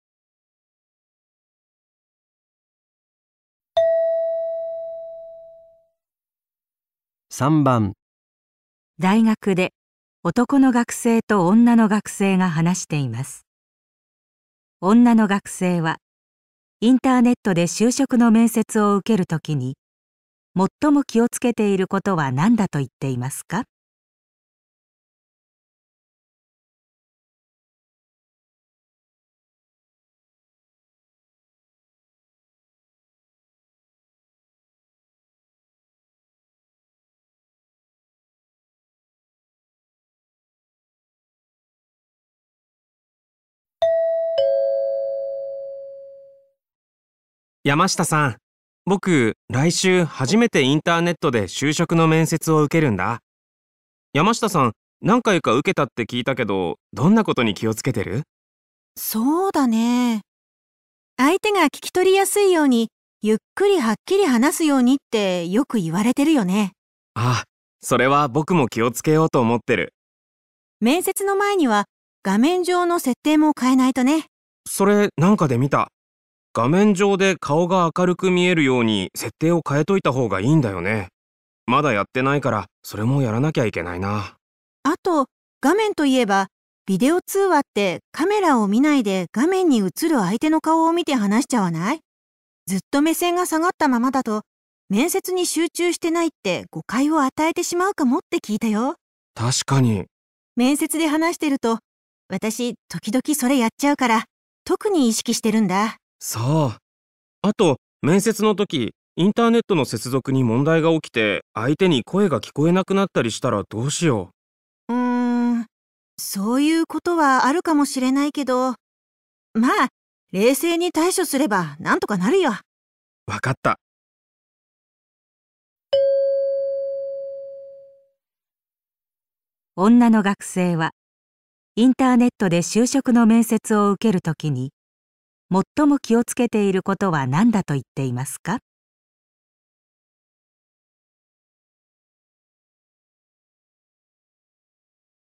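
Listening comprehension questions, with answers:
女の学生はインターネットで就職の面接を受ける時に、 最も気を つけていることは何だと言っていますか?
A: カメラに目線を合わせて話すこと

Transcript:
男:山下さん、僕来週、初めてインターネットで就職の面接を受けるんだ。山下さん、何回か受けたって聞いた けど、どんなことに気をつけてる?
女:そうだね。相手が聞き取りやすいようにゆっくりはっきり話すようにってよく言われてるよね。
男:あぁ、それは僕も気をつけようと思ってる。
女:面接の前には画面上の設定を変えないとね。
男:それ、何かで見た。 画面上で顔が明るく見えるように設定を変えといたほうがいいんだよね。 まだやってな いから、それもやんなきゃいけないな。
女:あと、画面といえば、ビデオ通話ってカメラを見ないで画面に映る相手の顔を見て話しちゃわない?ずっと 目線が下がったままだと、面接に集中してないって誤解を与えてしまうかもって聞いたよ。
男:確かに。
女:面接で話してると私、 時々それやっちゃうから、特に意識してるんだ。
男:そう。 あと面接の時、インターネットの接続に問題が起きて相手に声が聞こえなくなったりしたらどうしよう。
女:う~ん、そういうことはあるかもしれないけど、まぁ、冷静に対処すれば何とかなるよ。
男 : 分かった。
質問:女の学生はインターネットで就職の面接を受ける時に、 最も気をつけていることは何だと言っています か?

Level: 【N1 第1回】聴解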